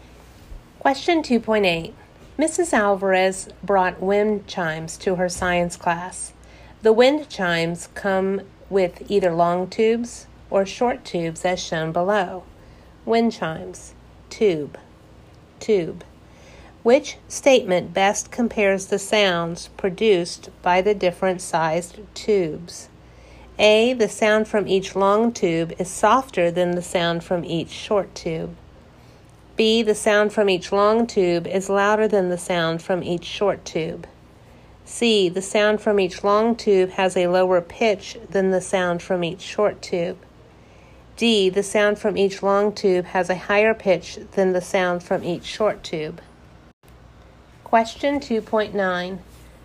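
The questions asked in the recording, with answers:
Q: Which statement best compares the sounds produced by the different sized tubes?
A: C: the sound from each long tube has a lower pitch than the sound from each short tube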